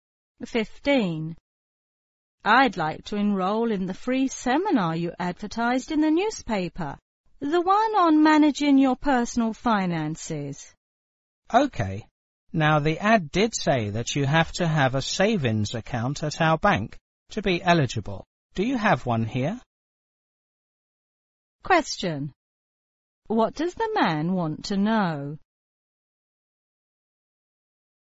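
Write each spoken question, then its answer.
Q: What does the man want to know?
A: Whether the woman has a savings account at the bank.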